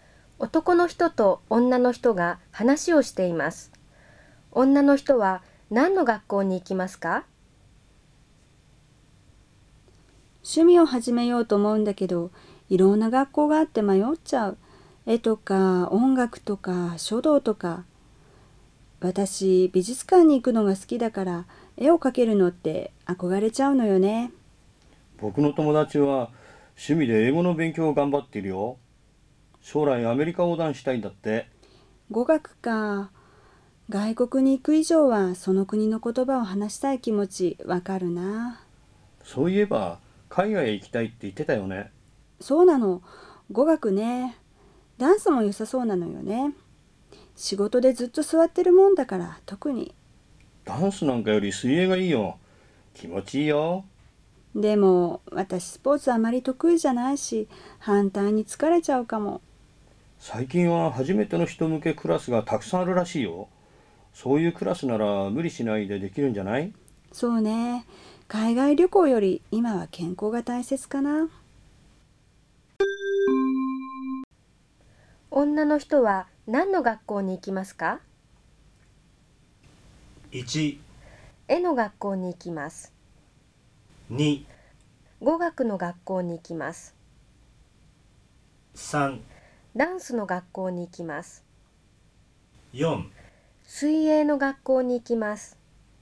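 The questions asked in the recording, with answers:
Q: 女の人は何の学校に行きますか?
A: 4: 水泳の学校に行きます。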